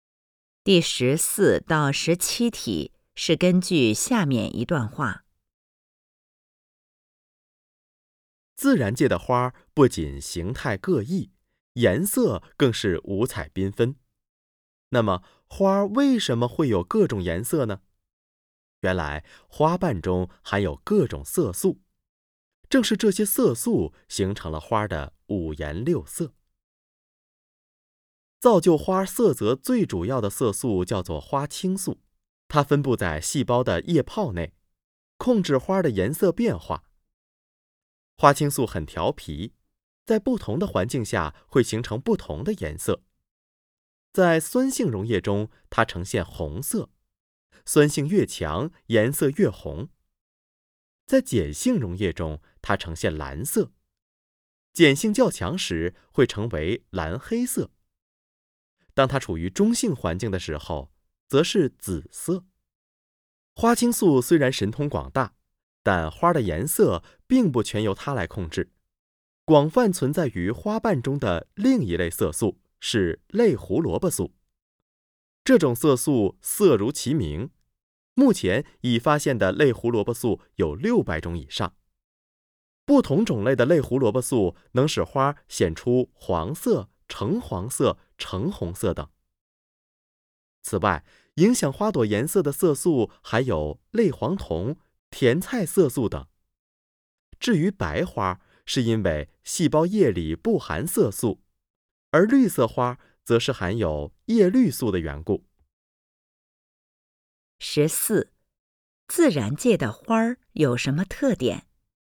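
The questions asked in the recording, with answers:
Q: 自然界的花有什么特点?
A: 形态各异,颜色五彩缤纷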